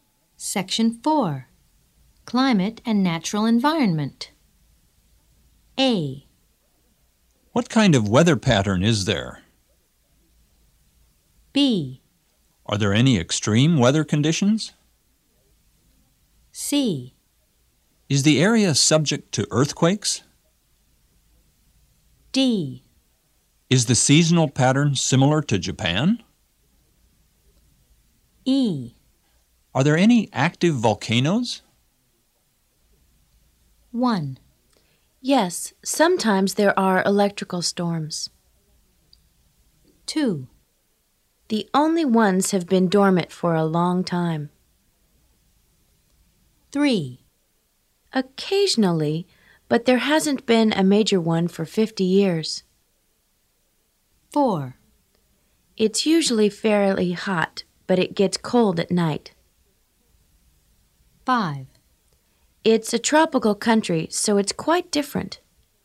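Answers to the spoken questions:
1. B: Are there any extreme weather conditions?
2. E: Are there any active volcanoes?
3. C: Is the area subject to earthquakes?
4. A: What kind of weather pattern is there?
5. D: Is the seasonal pattern similar to Japan?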